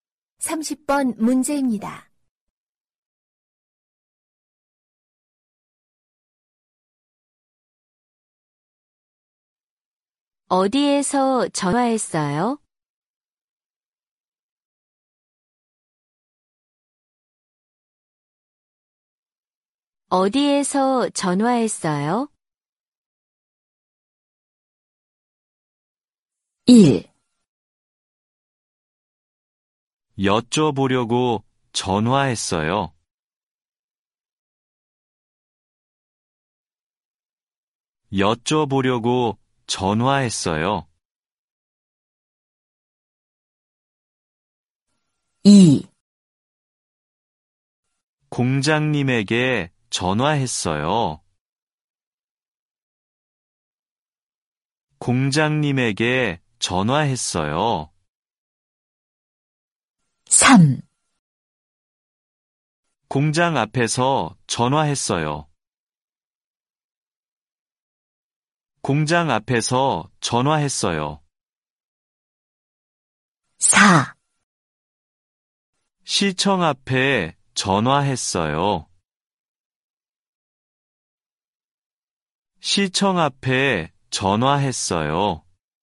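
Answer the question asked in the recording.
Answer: 3: 공장 앞에서 전화했어요.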